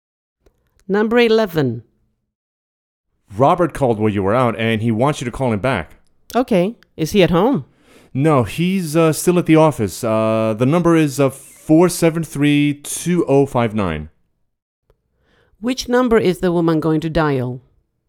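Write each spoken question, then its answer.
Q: Which number is the woman going to dial?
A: 473-2059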